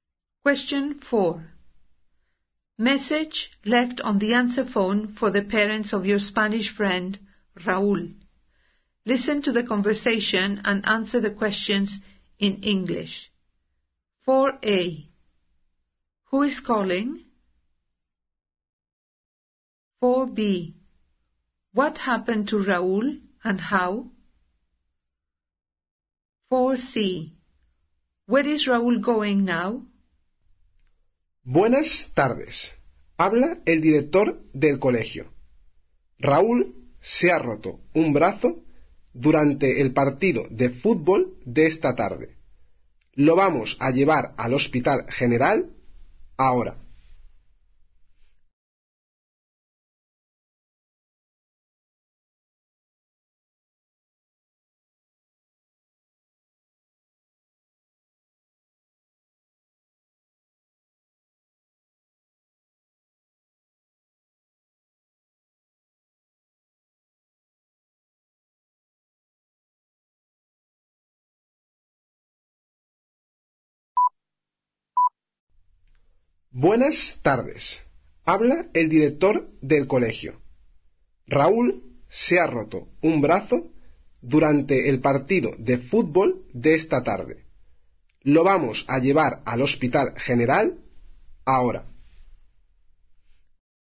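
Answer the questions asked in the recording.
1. The school headteacher
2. He broke his arm during this afternoon's football match
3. To the general hospital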